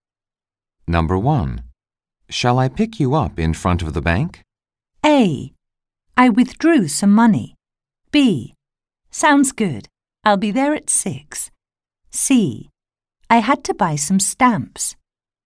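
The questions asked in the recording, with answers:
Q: Shall I pick you up in front of the bank?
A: B: Sounds good. I'll be there at 6.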